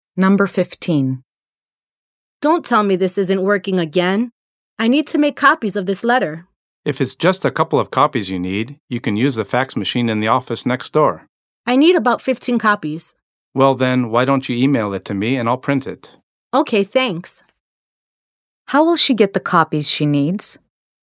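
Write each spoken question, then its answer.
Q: How will she get the copies she needs?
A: She'll email the letter to the man and he'll print it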